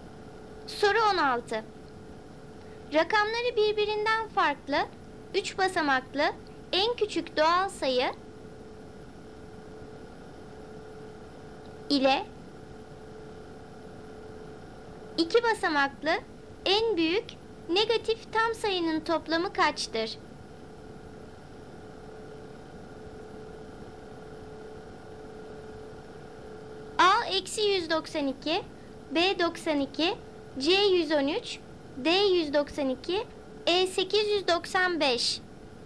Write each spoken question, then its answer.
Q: 2 basamaklı en büyük negatif tam sayının toplamı kaçtır?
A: Doğru cevap B 92.